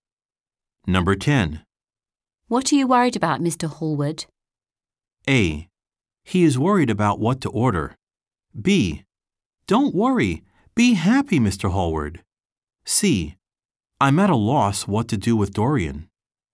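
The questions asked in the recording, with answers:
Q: What are you worried about, Mr. Hallward?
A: C: I'm at a loss what to do with Dorian.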